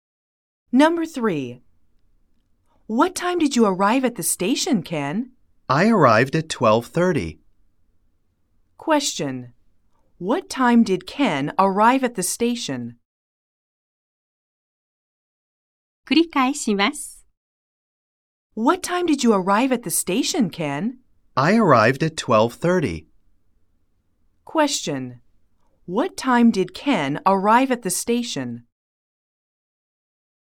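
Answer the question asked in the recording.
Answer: At 12:30.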